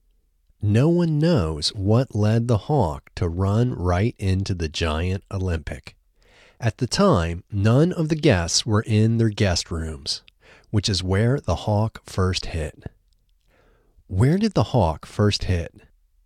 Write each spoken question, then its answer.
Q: Where did the Hawk first hit?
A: The Hawk first hit the guest rooms.